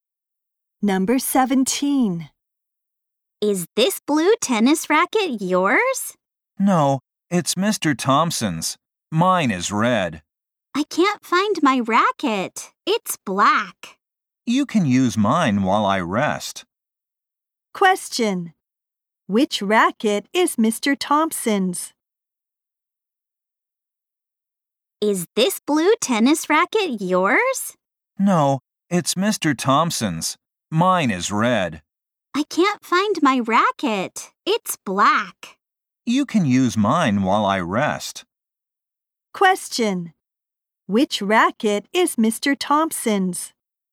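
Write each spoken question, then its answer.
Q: Which racket is Mr. Thompson's?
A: The blue one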